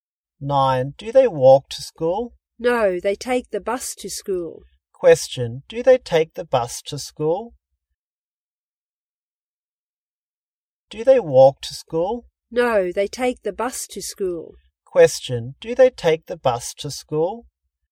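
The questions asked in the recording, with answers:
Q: do they take the bus to school?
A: Yes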